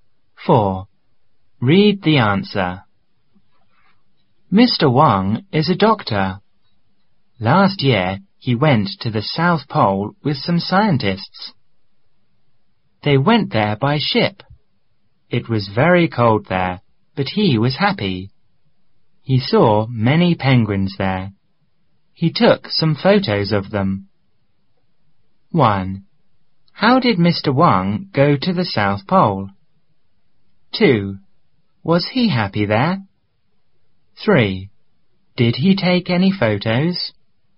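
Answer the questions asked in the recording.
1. By ship.
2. Yes, he was.
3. Yes, he did.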